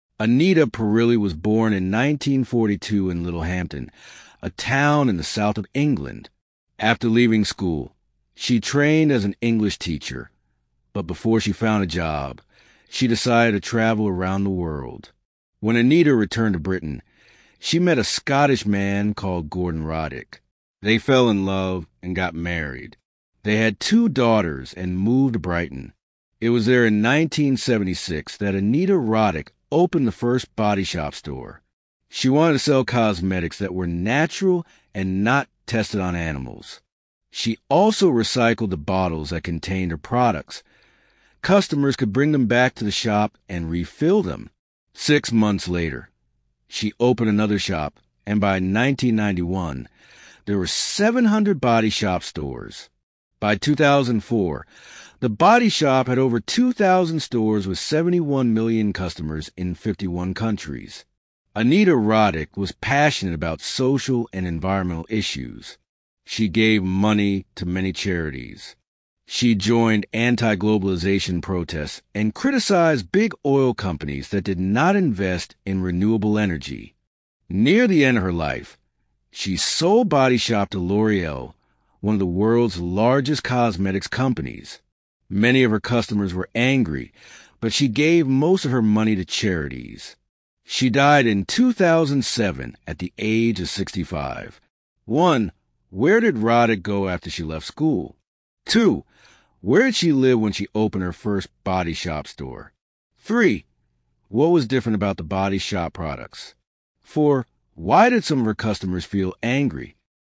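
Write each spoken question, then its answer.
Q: Where did Roddick go after she left school?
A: She trained as a teacher, then traveled around the world

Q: Where did she live when she opened her first body shop store?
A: Brighton

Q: What was different about the body shop products?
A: They were natural, not tested on animals, and in recycled, refillable bottles

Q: Why did some of her customers feel angry?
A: She sold the Body Shop to L'Oreal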